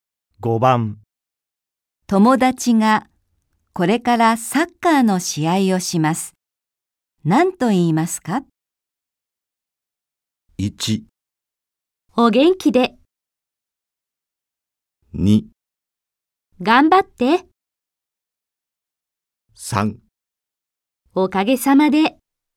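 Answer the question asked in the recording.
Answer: 2: 頑張って。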